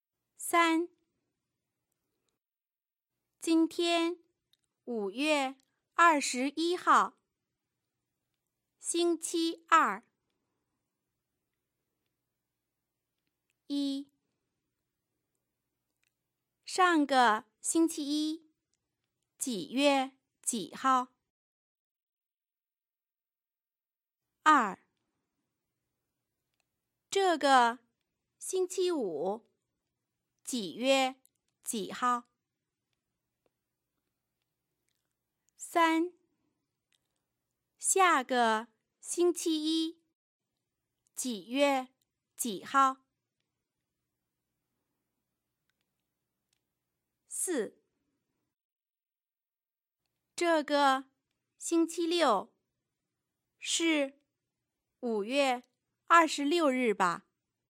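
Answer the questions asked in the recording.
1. 5月13号
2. 5月24号
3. 5月27号
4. 不是,是5月25日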